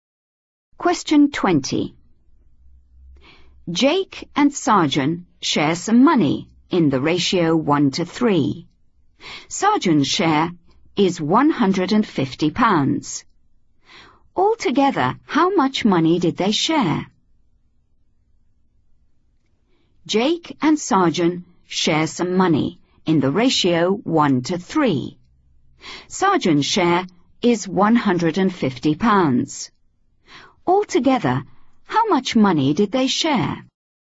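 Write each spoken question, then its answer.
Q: Sarjan's share is £150. Altogether, how much money did they share?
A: £200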